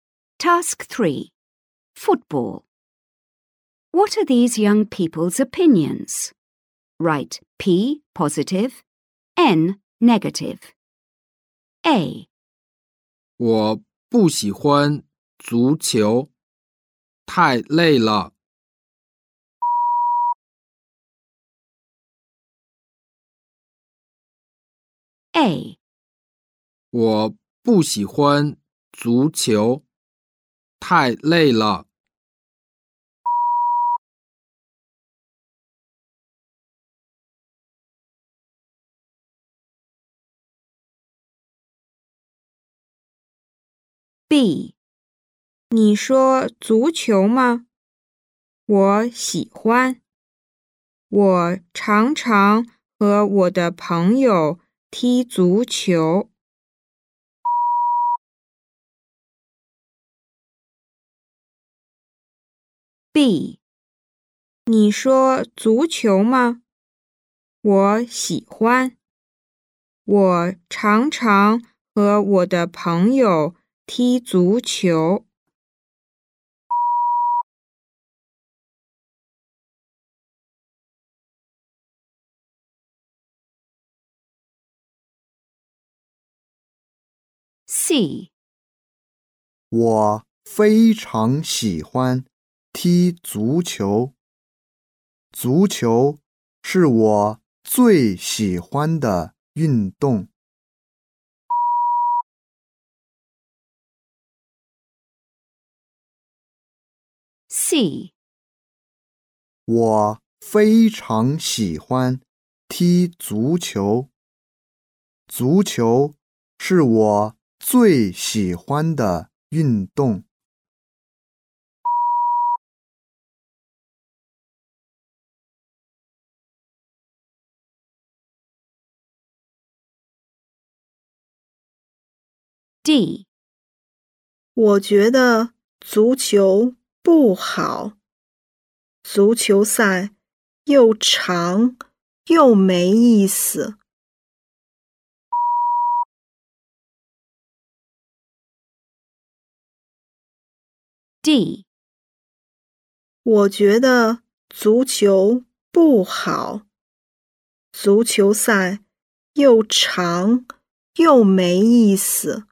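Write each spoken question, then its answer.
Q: What are these young people's opinions?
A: N: negative

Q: What are these young people's opinions?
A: P: positive

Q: What are these young people's opinions?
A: P: positive

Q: What are these young people's opinions?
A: N: negative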